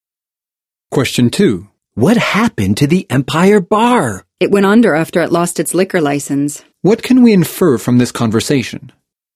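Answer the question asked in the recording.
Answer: The Empire Bar closed down after losing its liquor license.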